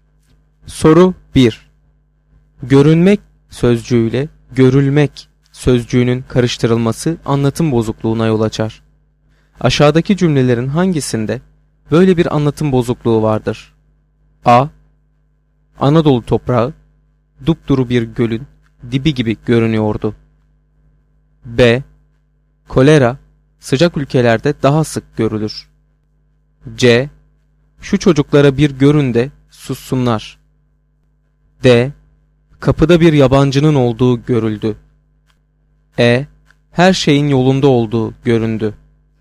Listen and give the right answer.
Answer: Doğru cevap E şıkkı.